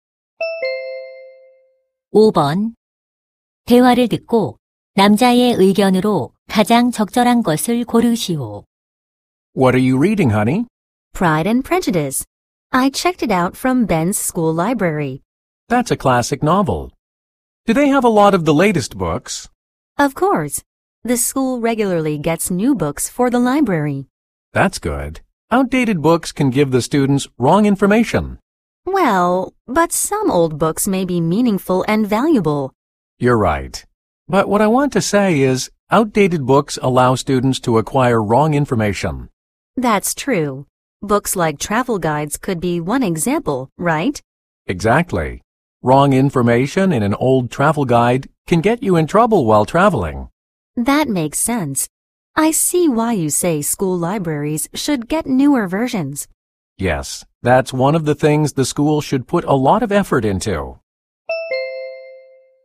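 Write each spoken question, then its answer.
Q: 대화를 듣고 남자의 의견으로 가장 적절한 것을 고르시오.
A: 학교 도서관은 최신 도서를 갖추어야 한다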